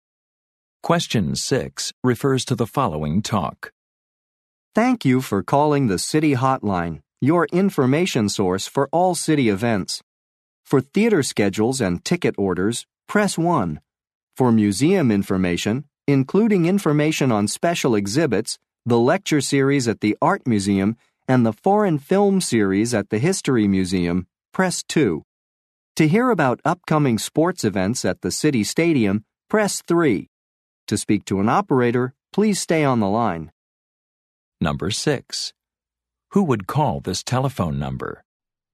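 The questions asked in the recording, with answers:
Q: Who would call this telephone number?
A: People wanting information on city events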